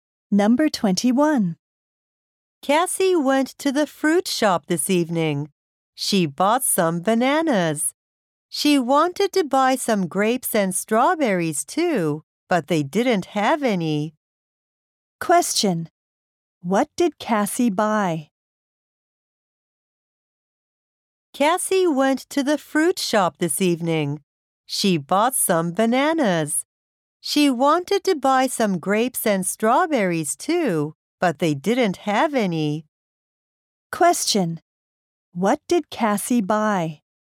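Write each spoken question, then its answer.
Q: What did Cassie buy?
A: Some bananas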